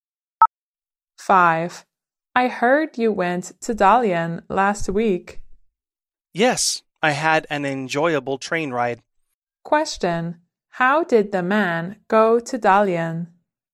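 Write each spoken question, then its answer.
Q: Question.How did the man go to Dalian?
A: By train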